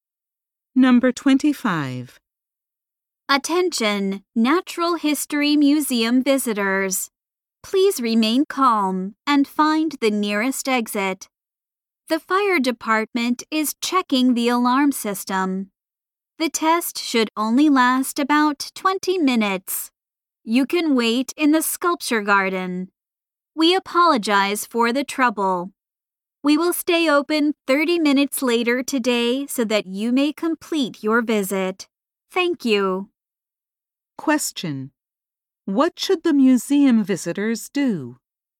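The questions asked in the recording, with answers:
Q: what should the museum visitors do?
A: Stay calm, go to the nearest exit and wait in the sculpture garden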